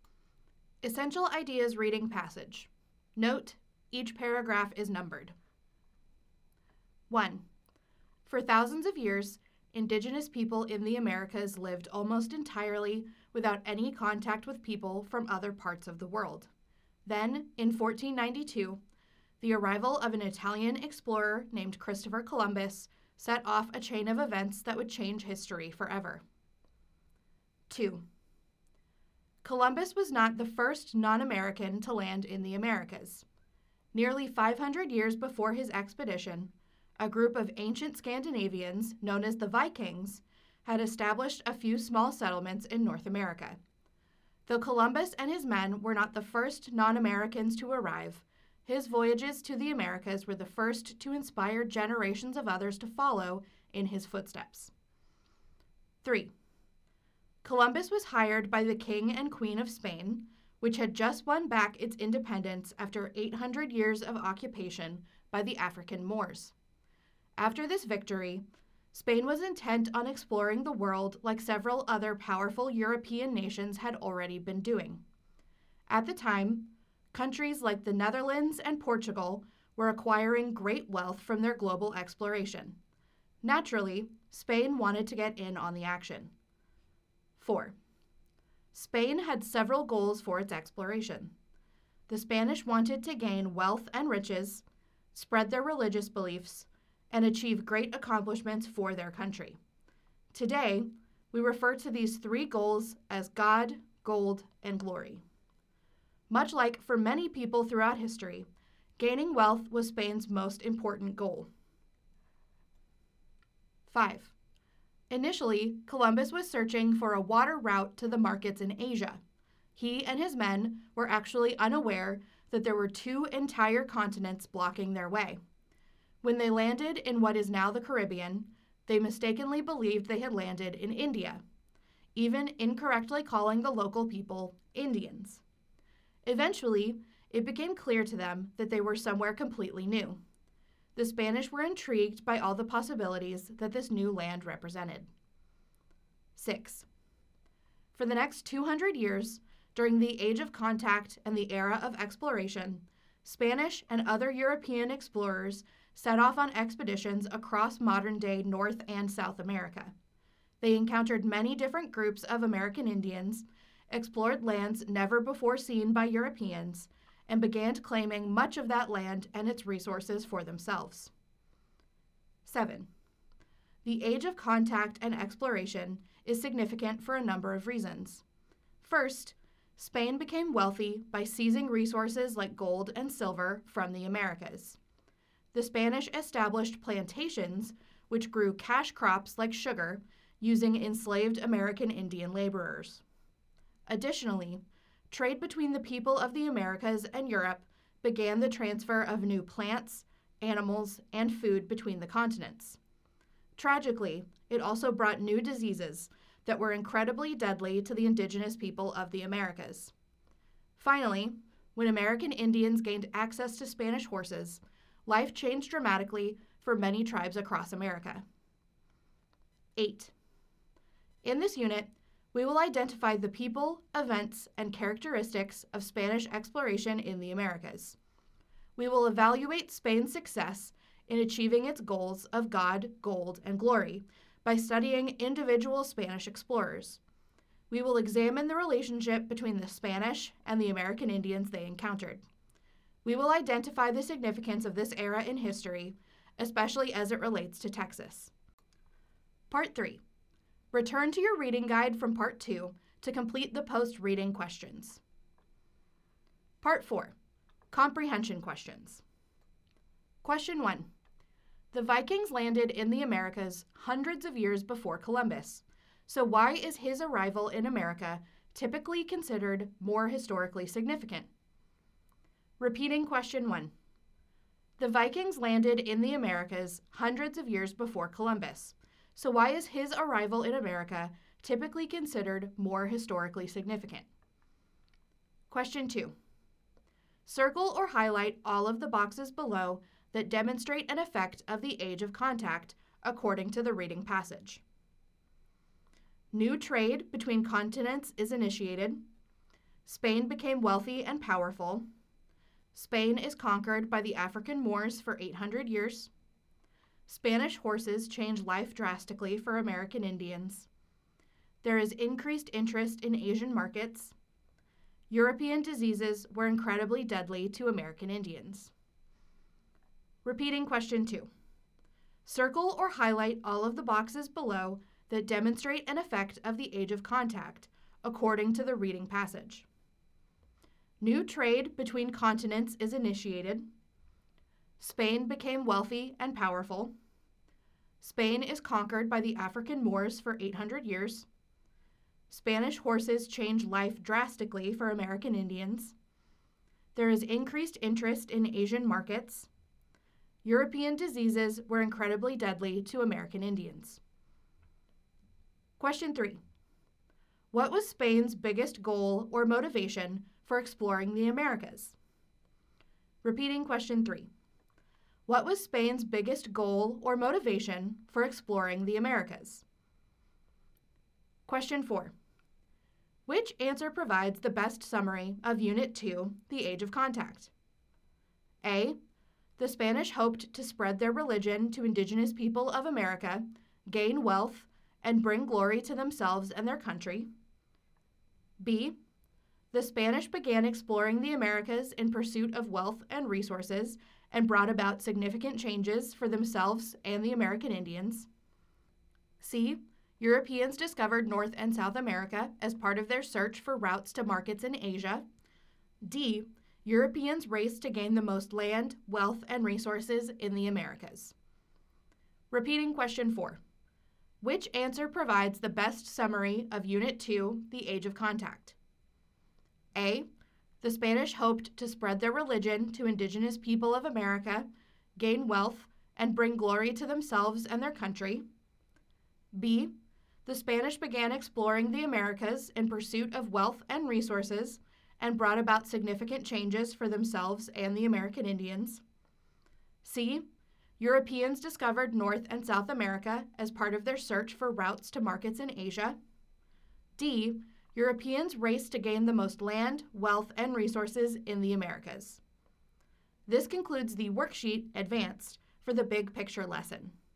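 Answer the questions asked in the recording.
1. His voyages were the first to inspire generations of others to follow in his footsteps.
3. Gaining wealth (gold)
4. B: The Spanish began exploring the Americas in pursuit of wealth and resources and brought about significant changes for themselves and the American Indians.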